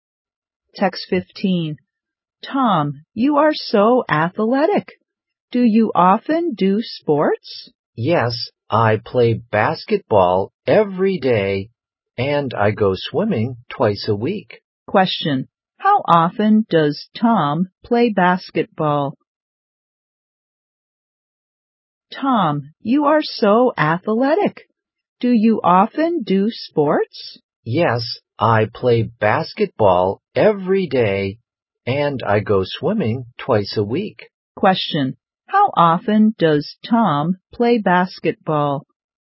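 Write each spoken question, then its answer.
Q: How often does Tom play basketball?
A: Every day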